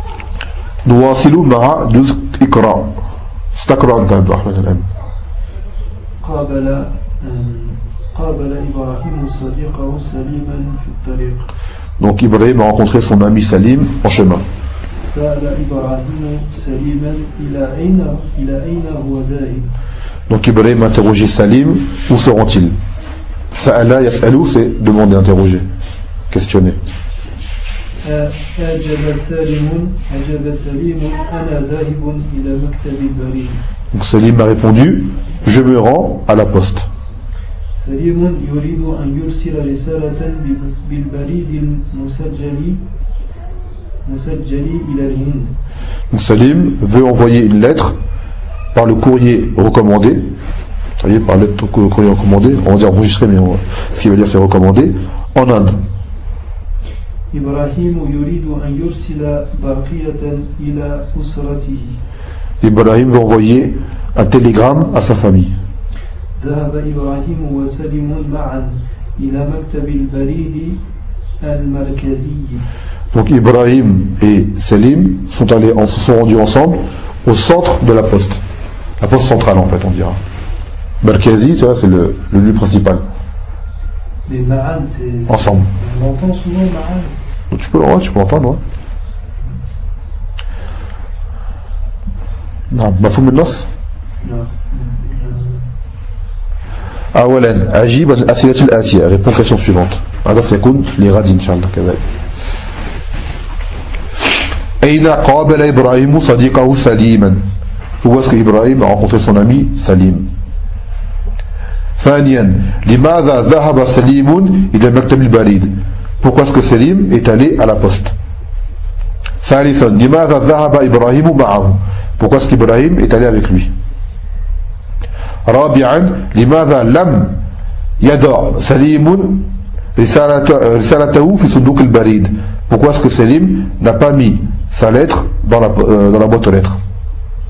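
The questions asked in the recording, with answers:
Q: Où est-ce qu'Ibrahim a rencontré son ami Salim?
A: En chemin (dans la rue)

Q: Pourquoi est-ce que Salim est allé à la poste?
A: Pour envoyer une lettre recommandée en Inde

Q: Pourquoi est-ce qu'Ibrahim est allé avec lui?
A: Pour envoyer un télégramme à sa famille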